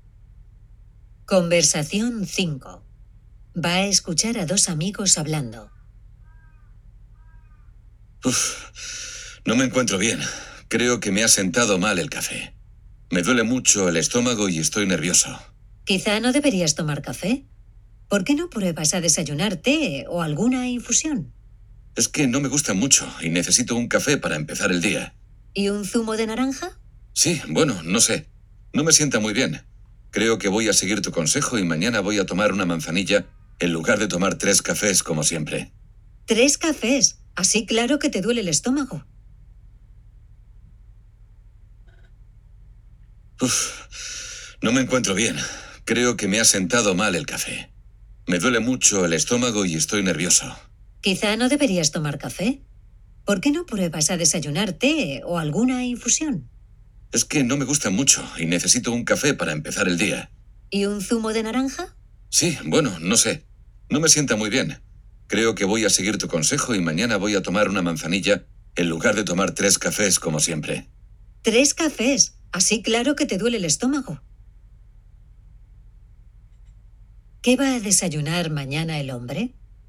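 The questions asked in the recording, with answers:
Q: ¿Qué va a desayunar mañana el hombre?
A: Una manzanilla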